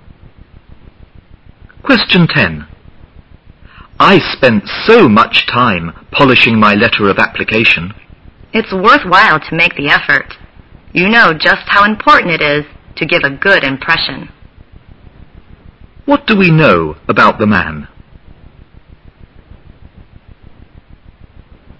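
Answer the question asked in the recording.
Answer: He spent a lot of time polishing his application letter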